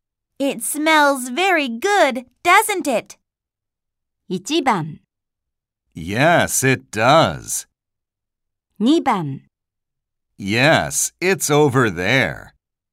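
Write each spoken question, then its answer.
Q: It smells very good, doesn't it?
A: 1: Yes, it does.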